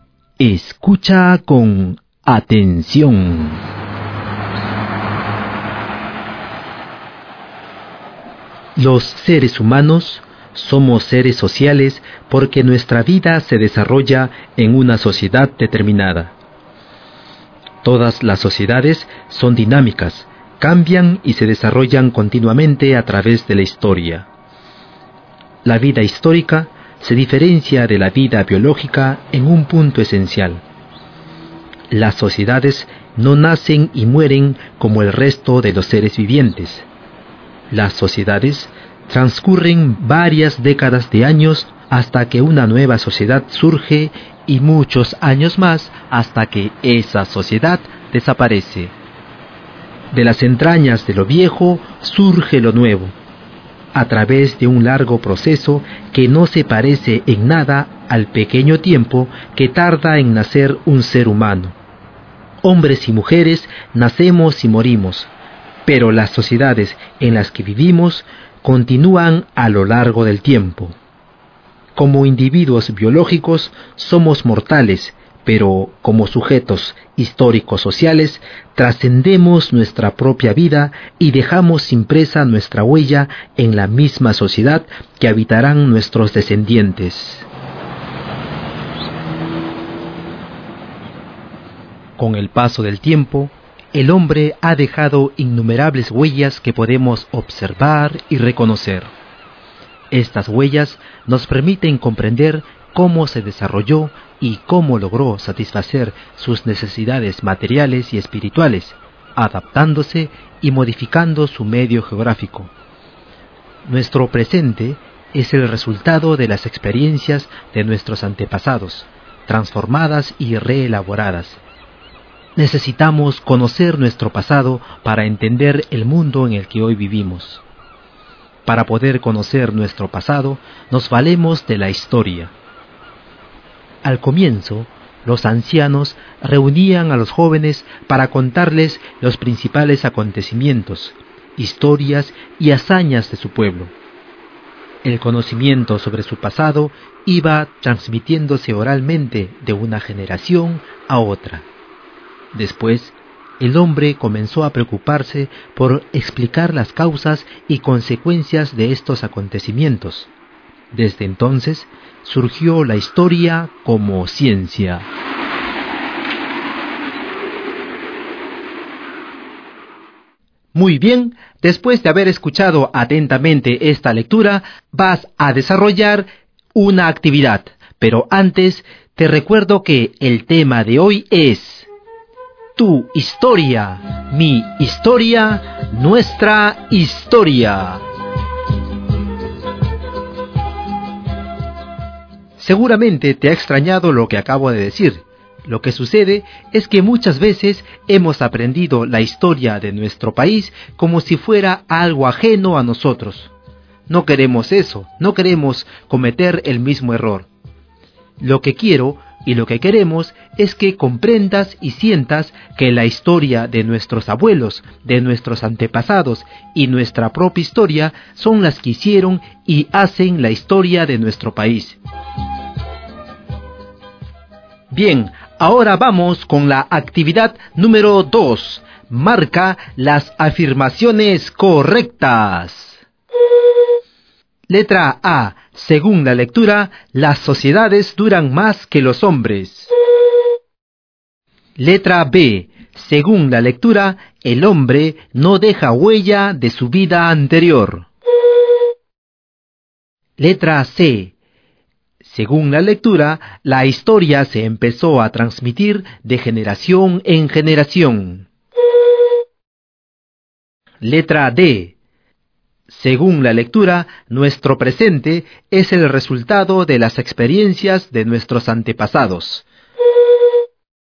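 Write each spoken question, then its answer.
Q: Según la lectura, las sociedades duran más que los hombres.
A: Correcta

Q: Según la lectura, el hombre no deja huella de su vida anterior.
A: Incorrecta

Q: Según la lectura, la historia se empezó a transmitir de generación en generación.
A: Correcta

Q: Según la lectura, nuestro presente es el resultado de las experiencias de nuestros antepasados.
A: Correcta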